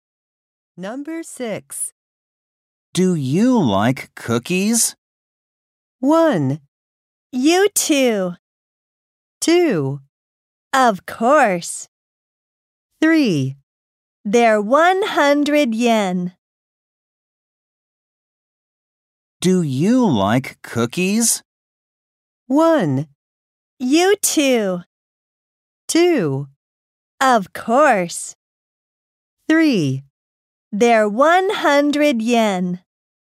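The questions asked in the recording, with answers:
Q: Do you like cookies?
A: 2: Of course.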